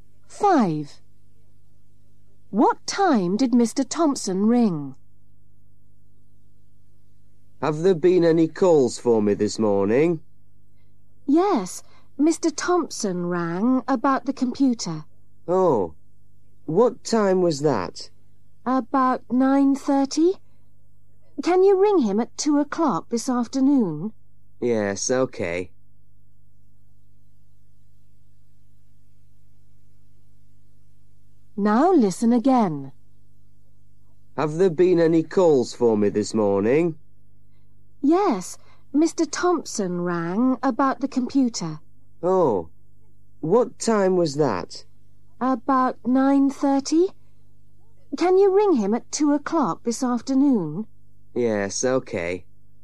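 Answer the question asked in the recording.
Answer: about 9:30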